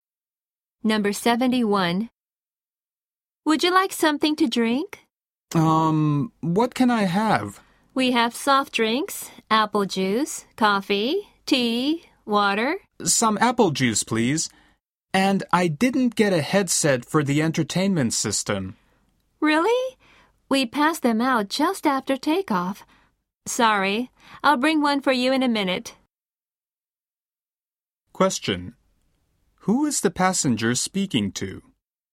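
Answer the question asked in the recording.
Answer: A flight attendant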